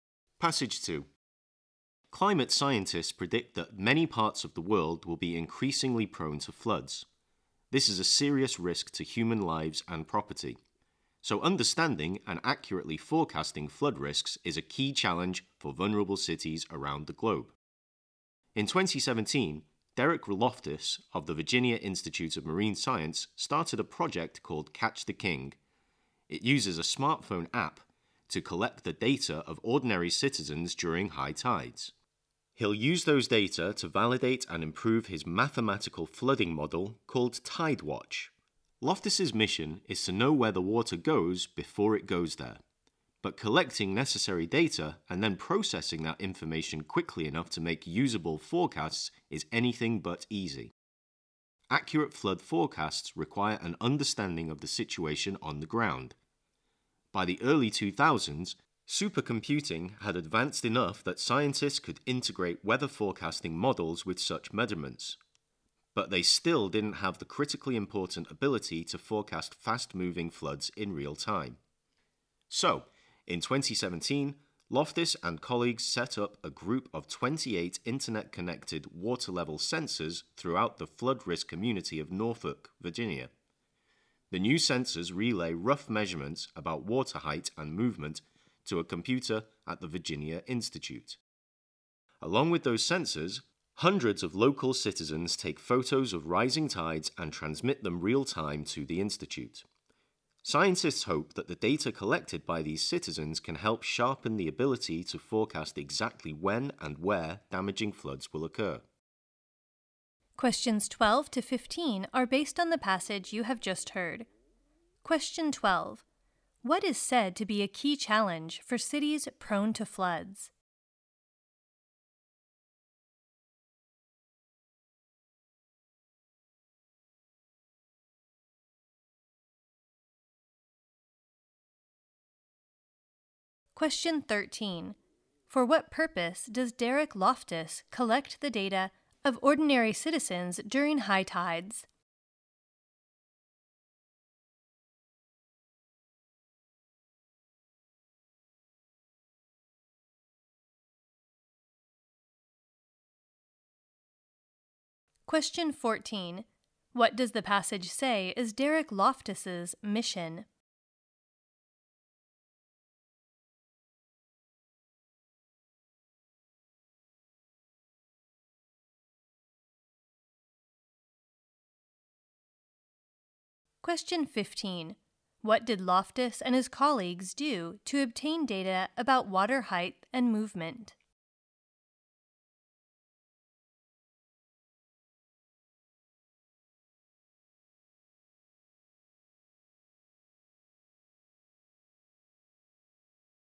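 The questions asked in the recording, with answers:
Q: What is said to be a key challenge for cities prone to floods?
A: Understanding and accurately forecasting flood risks

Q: For what purpose does Derek Loftus collect the data of ordinary citizens during high tides?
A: To validate and improve his flooding model, Tidewatch

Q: What does the passage say is Derek Loftus's mission?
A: To know where the water goes before it goes there

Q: What did Loftus and his colleagues do to obtain data about water height and movement?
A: They set up 28 internet-connected water level sensors in Norfolk, Virginia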